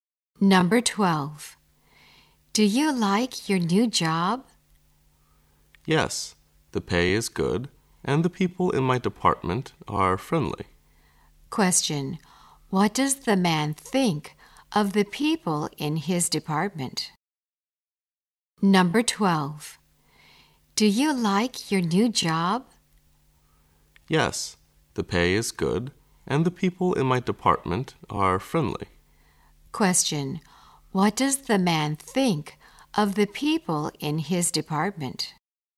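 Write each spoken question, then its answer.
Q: what does the man think of the people in his department?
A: They are friendly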